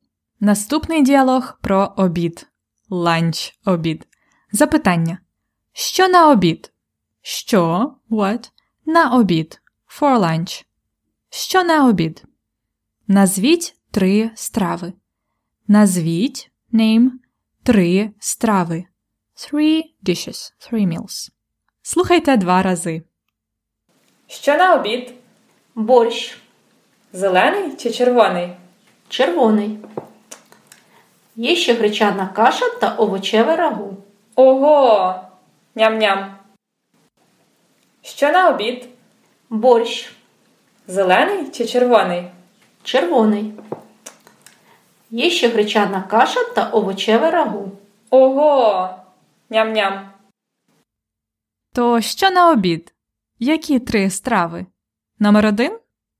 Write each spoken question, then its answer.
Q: Що на обід? Назвіть три страви.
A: Борщ, гречана каша і овочеве рагу.